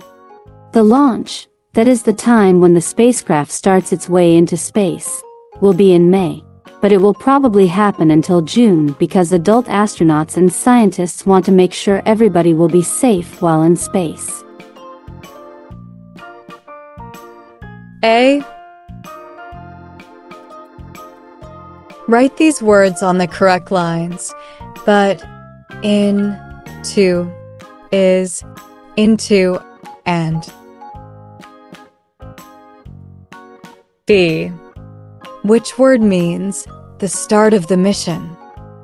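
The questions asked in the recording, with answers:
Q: Which word means the start of the mission?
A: Launch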